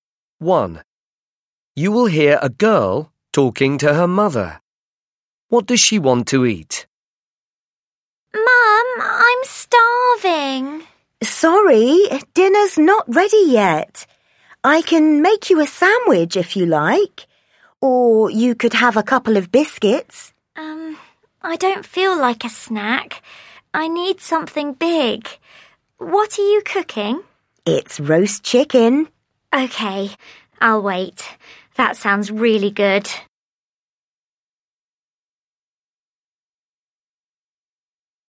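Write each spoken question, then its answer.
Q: What does she want to eat?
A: roast chicken (dinner)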